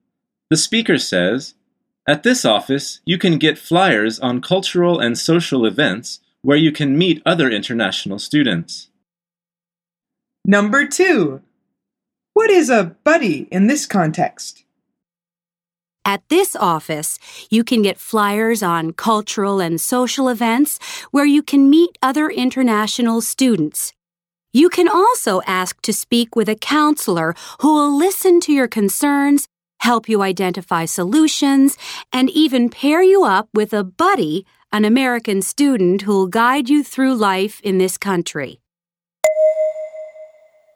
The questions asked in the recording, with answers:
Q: What is a buddy in this context?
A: The answer is an American student.